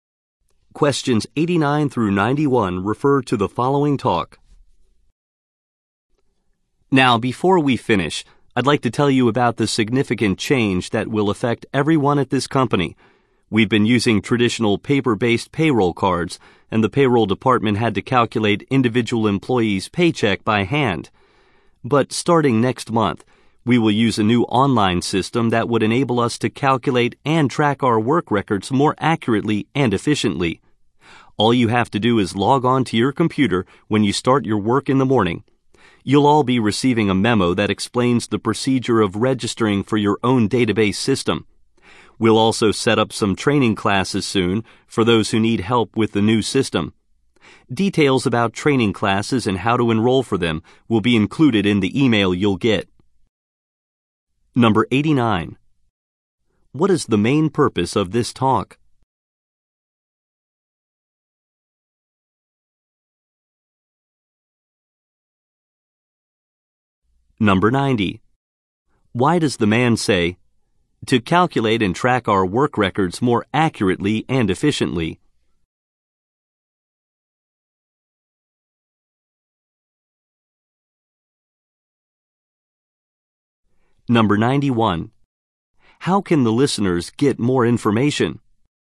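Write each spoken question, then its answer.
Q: What is the main purpose of this talk?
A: To announce a new online payroll system

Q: How can the listeners get more information?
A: From the memo and email they will receive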